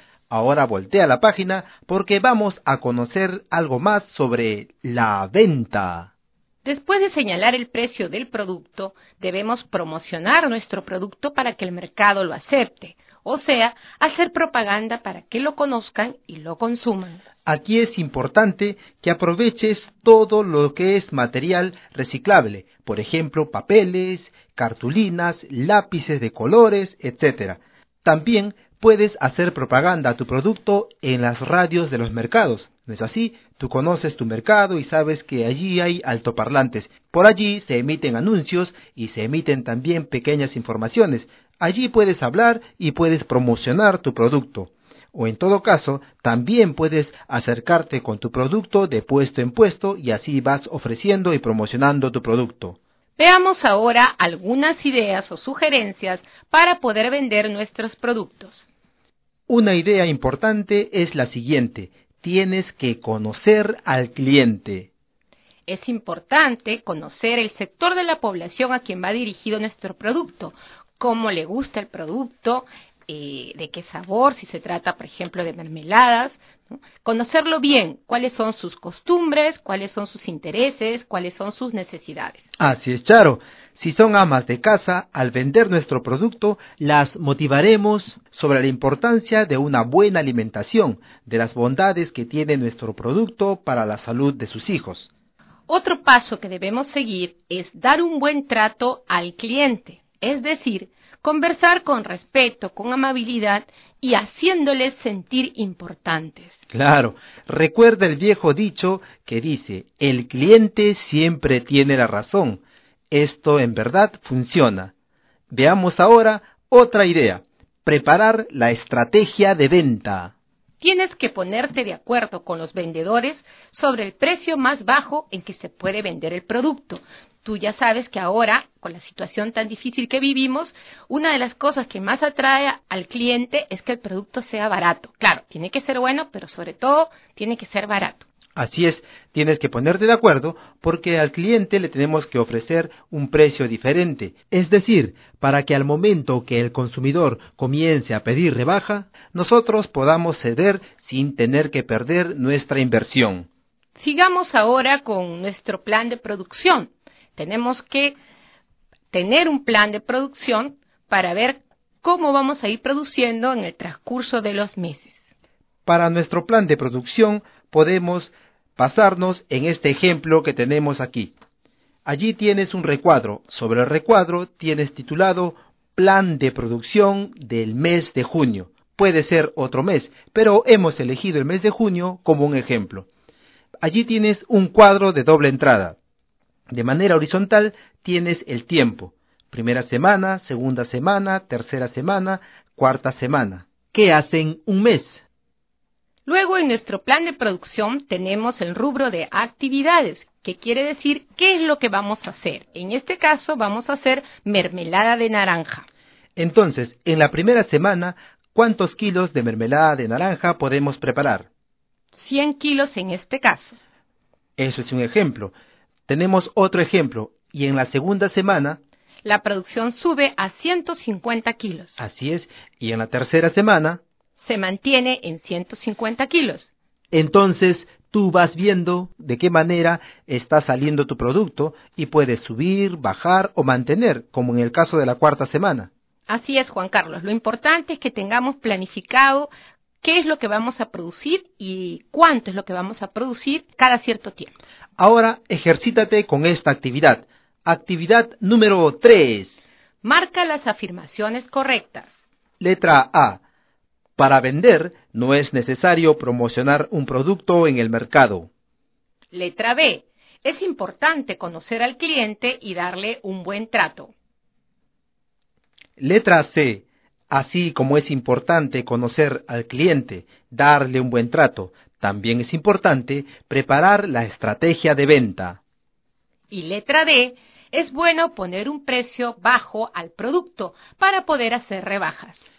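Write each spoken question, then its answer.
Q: Letra A. Para vender, no es necesario promocionar un producto en el mercado.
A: Incorrecta

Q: Letra B. Es importante conocer al cliente y darle un buen trato.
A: Correcta

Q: Letra C. Así como es importante conocer al cliente, darle un buen trato, también es importante preparar la estrategia de venta.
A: Correcta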